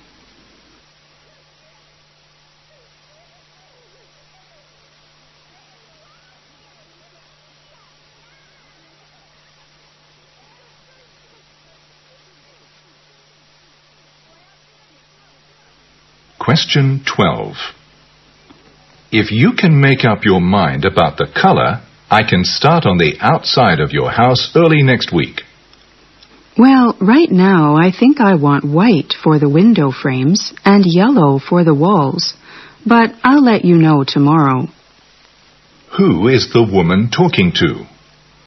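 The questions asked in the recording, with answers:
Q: Who is the woman talking to?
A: A house painter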